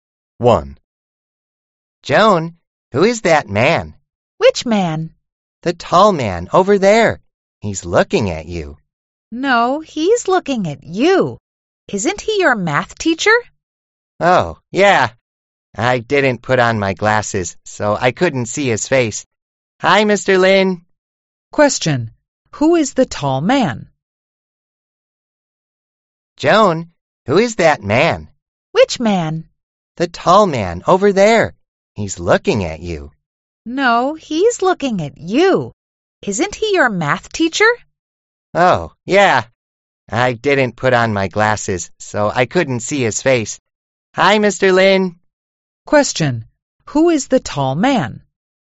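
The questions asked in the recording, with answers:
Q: Question, who is the tall man?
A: Joan's math teacher, Mr. Lin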